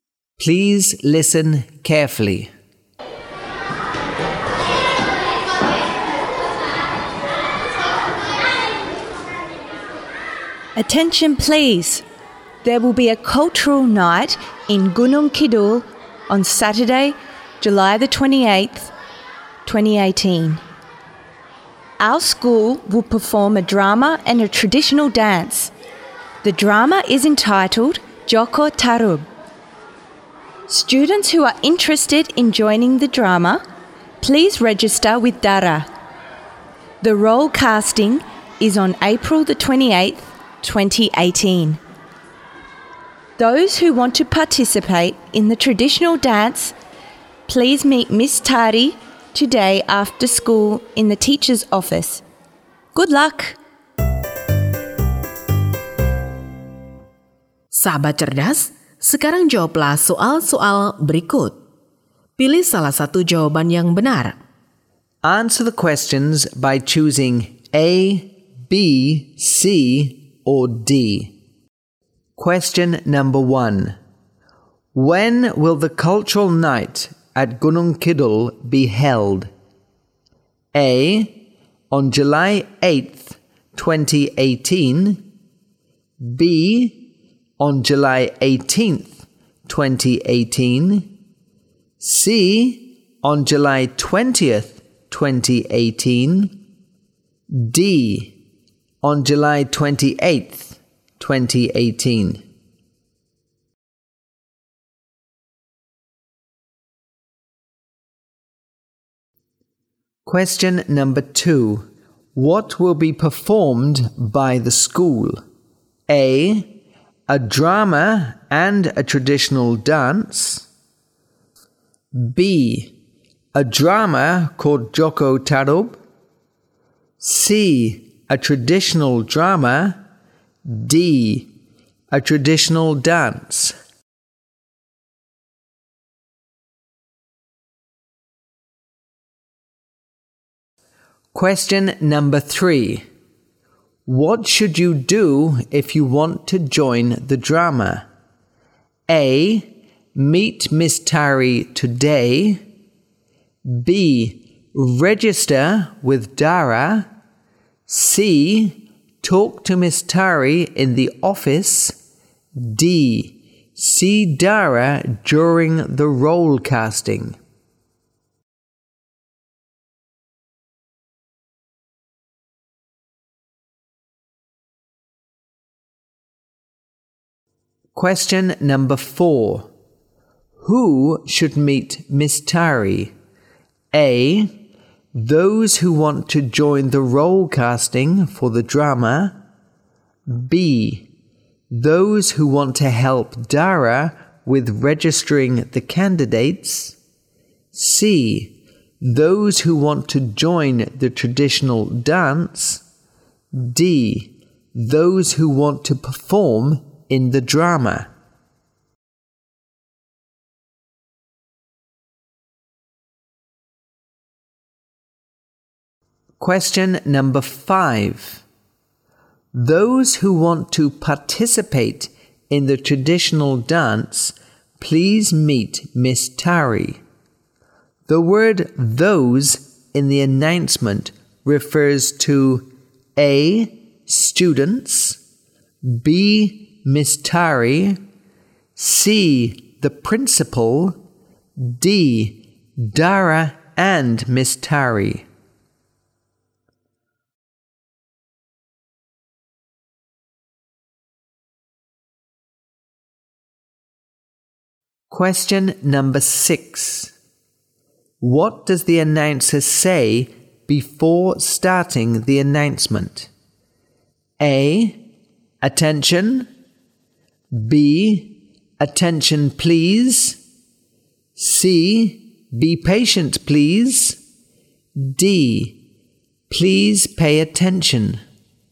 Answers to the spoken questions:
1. D. On July 28th, 2018.
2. A. A drama and a traditional dance.
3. B. Register with Dara.
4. C. Those who want to join the traditional dance.
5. A. students.
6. B. attention please.